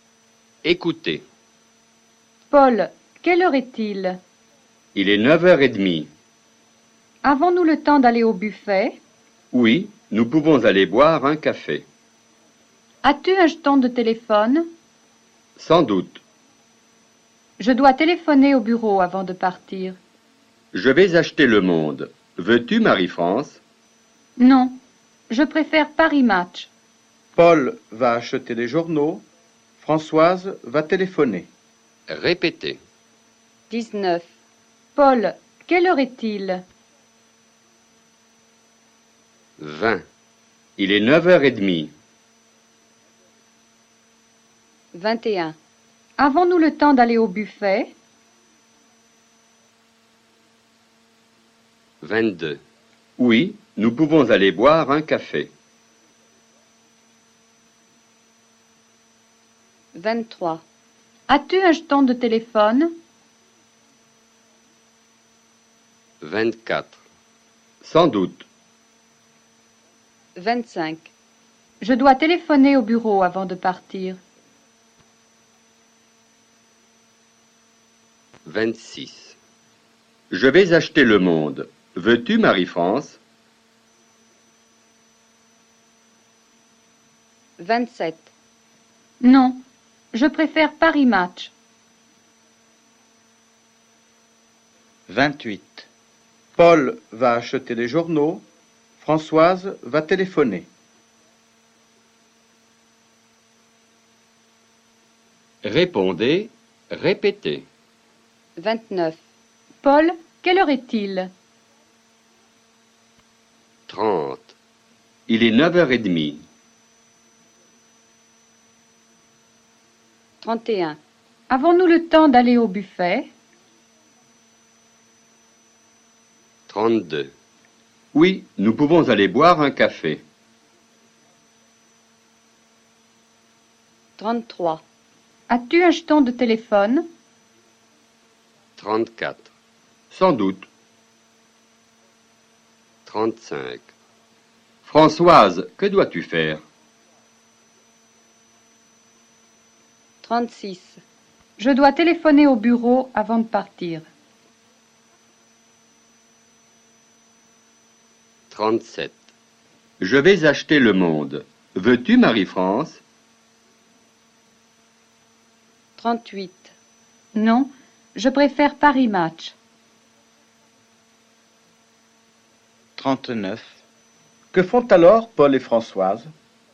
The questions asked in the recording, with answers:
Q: Que font alors Paul et Françoise?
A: Paul va acheter des journaux.